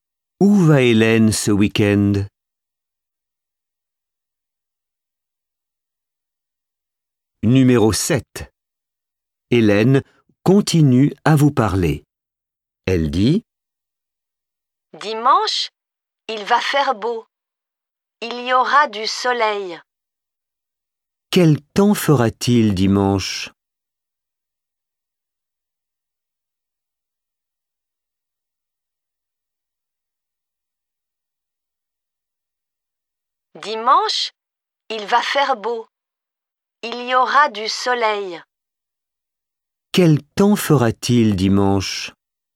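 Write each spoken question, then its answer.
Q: Quel temps fera-t-il dimanche?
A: Il fera beau, du soleil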